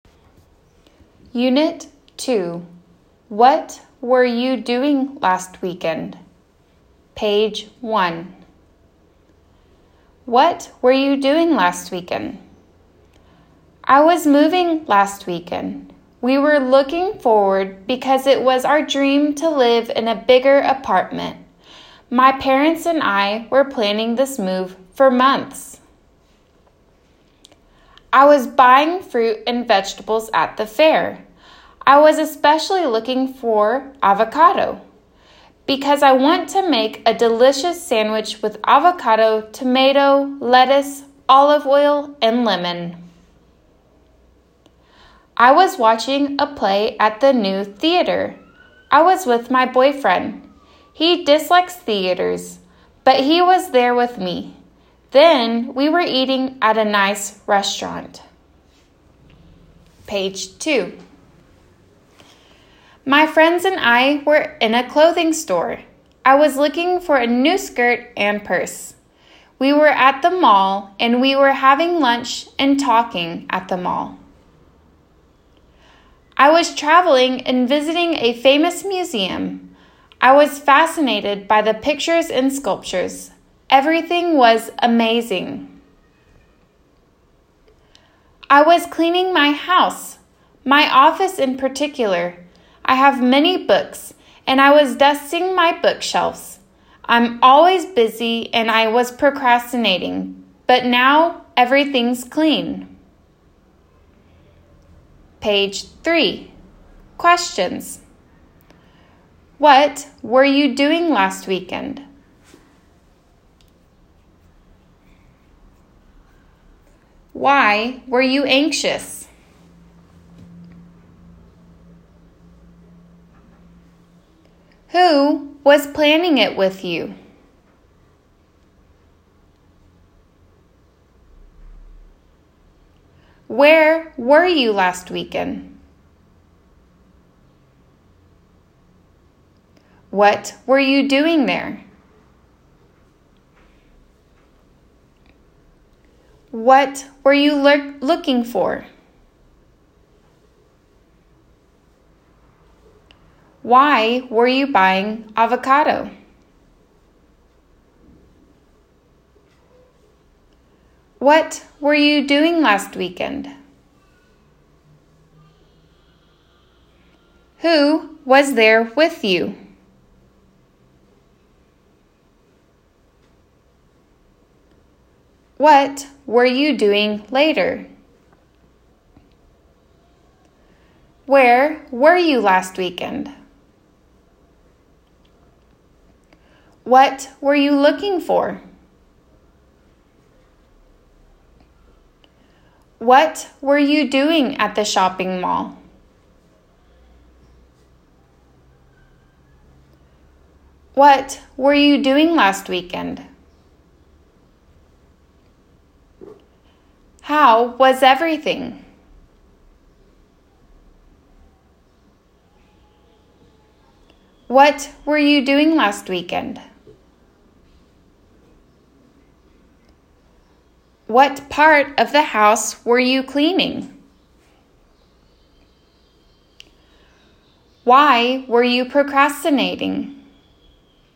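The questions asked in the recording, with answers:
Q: What were you doing last weekend?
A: I was moving.

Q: Who was planning it with you?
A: My parents.

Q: Where were you last weekend?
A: At the fair.

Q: What were you doing there?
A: Buying fruit and vegetables.

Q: What were you looking for?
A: Avocado.

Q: Why were you buying avocado?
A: To make a delicious sandwich.

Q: What were you doing last weekend?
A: Watching a play at the new theater.

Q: Who was there with you?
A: My boyfriend.

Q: What were you doing later?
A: Eating at a nice restaurant.

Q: Where were you last weekend?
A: In a clothing store.

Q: What were you looking for?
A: A new skirt and purse.

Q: What were you doing at the shopping mall?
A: Having lunch and talking.

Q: What were you doing last weekend?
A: Traveling and visiting a famous museum.

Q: How was everything?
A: Amazing.

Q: What were you doing last weekend?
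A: Cleaning my house.

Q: What part of the house were you cleaning?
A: My office.

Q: Why were you procrastinating?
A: Because I'm always busy.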